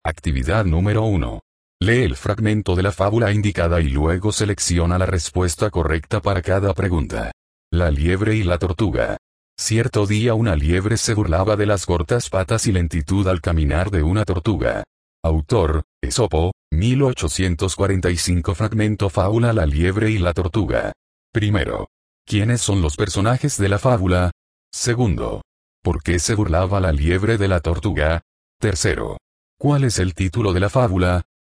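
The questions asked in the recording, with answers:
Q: ¿Quiénes son los personajes de la fábula?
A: Una liebre y una tortuga

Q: ¿Por qué se burlaba la liebre de la tortuga?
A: Por sus cortas patas y su lentitud al caminar

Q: ¿Cuál es el título de la fábula?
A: La liebre y la tortuga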